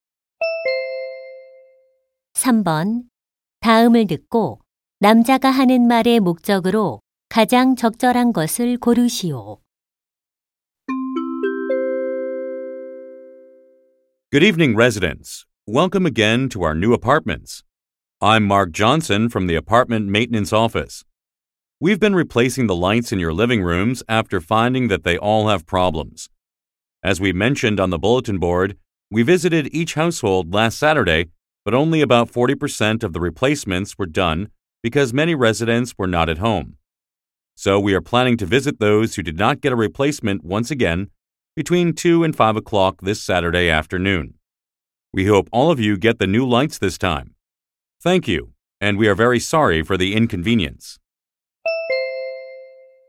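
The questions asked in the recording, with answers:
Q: 다음을 듣고 남자가 하는 말의 목적으로 가장 적절한 것을 고르시오.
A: 이번 토요일 오후 2시~5시에 미교체 가구의 거실 조명 교체 재방문을 안내하려고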